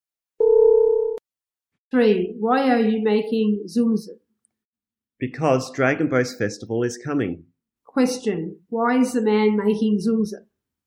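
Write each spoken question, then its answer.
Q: Question, why is the man making zumzum?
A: Because Dragon Boat Festival is coming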